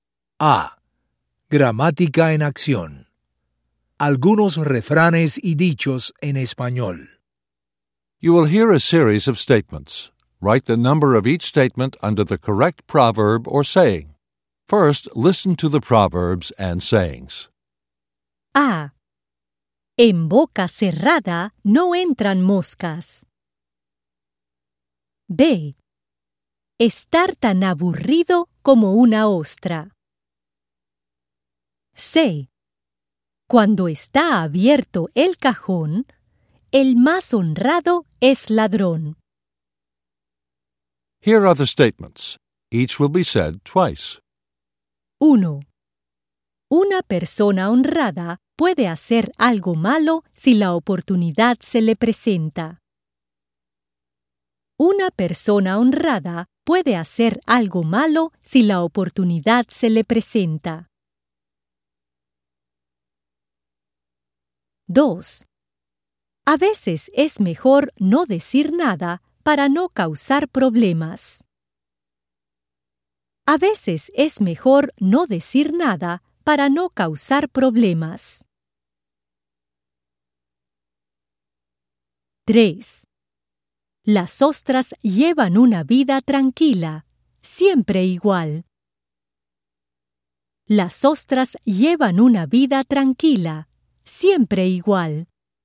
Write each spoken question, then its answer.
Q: Una persona honrada puede hacer algo malo si la oportunidad se le presenta.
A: C. 1.

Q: A veces es mejor no decir nada para no causar problemas.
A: A. 2.

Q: Las ostras llevan una vida tranquila, siempre igual.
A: B. 3.